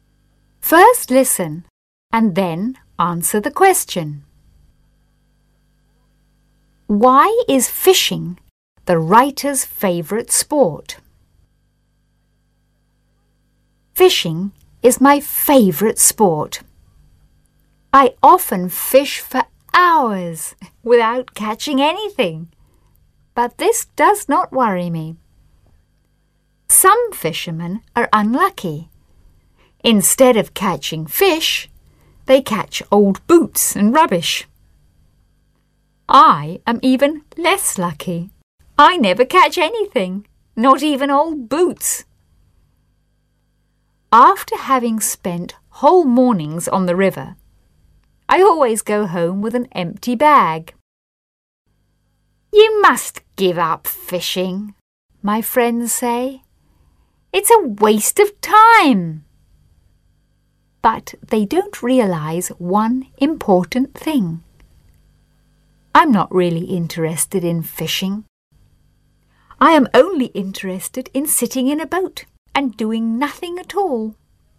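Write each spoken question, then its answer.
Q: Why is fishing the writer's favourite sport?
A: Because he can sit in a boat and do nothing at all.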